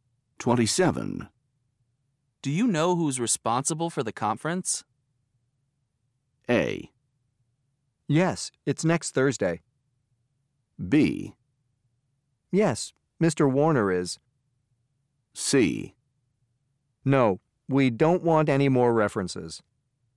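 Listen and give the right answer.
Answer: B: Yes, Mr. Warner is.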